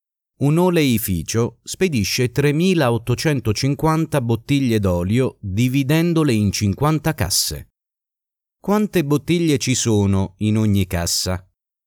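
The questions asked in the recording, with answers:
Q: Quante bottiglie ci sono in ogni cassa?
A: 77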